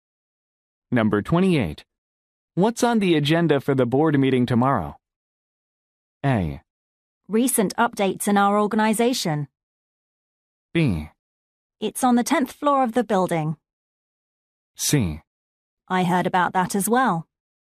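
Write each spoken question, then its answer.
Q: What's on the agenda for the board meeting tomorrow?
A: A: Recent updates in our organization.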